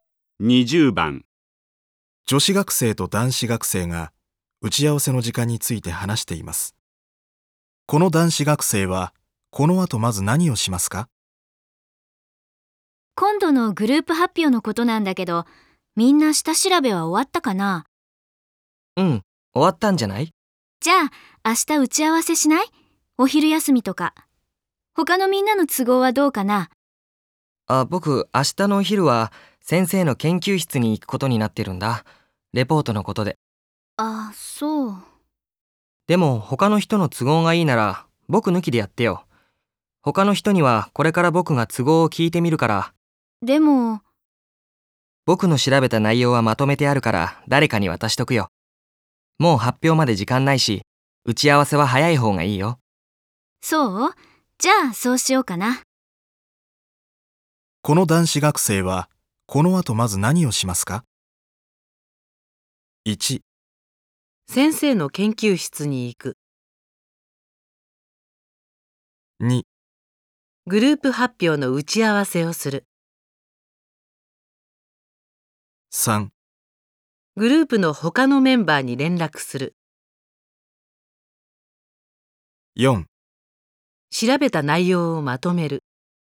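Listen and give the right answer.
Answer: 3: グループの他のメンバーに連絡する。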